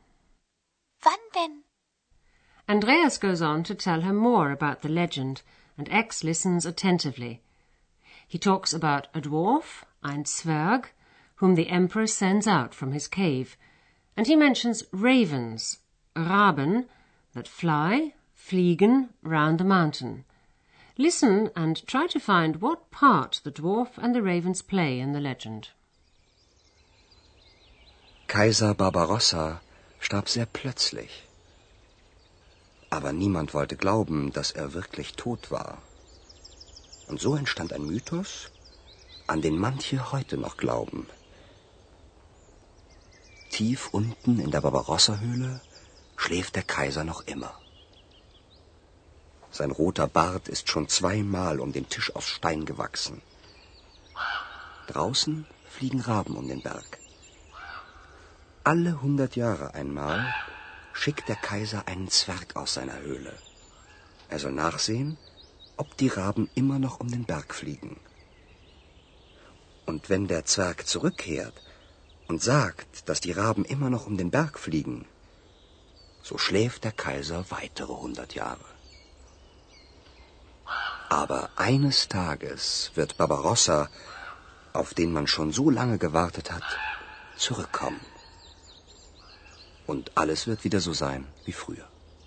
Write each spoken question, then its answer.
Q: Listen and try to find what part the dwarf and the ravens play in the legend.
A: Once every hundred years, Barbarossa sends a dwarf out of his cave.